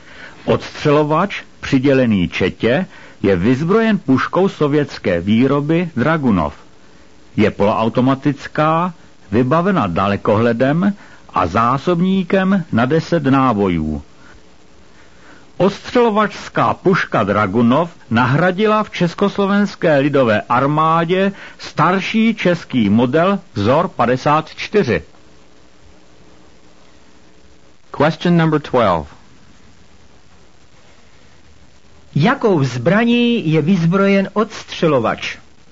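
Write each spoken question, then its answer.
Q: Jakou zbraní je vyzbrojen odstřelovač?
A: Poloautomatickou puškou sovětské výroby Dragunov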